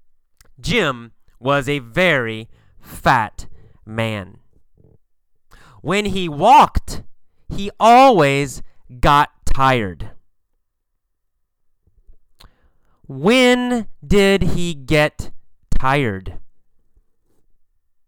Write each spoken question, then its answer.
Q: When did he get tired?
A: When he walked. When he walked, he got tired.